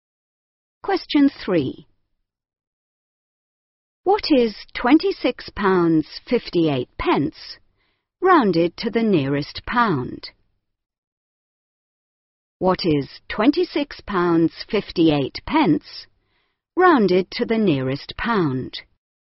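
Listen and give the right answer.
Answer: 27 pounds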